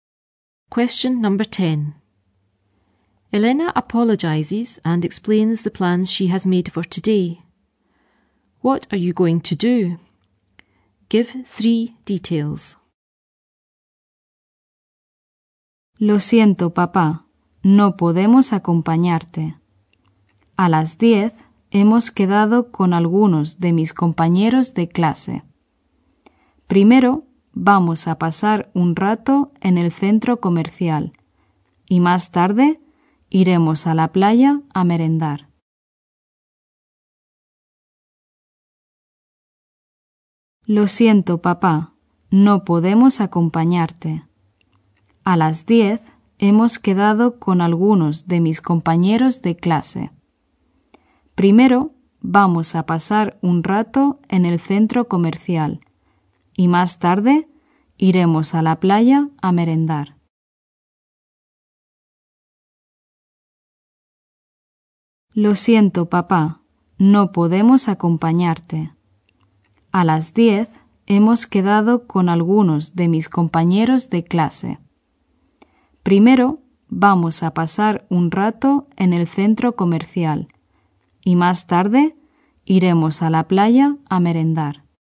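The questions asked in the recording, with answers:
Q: What are you going to do?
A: Meet classmates at 10; spend time at the shopping centre; later go to the beach for a snack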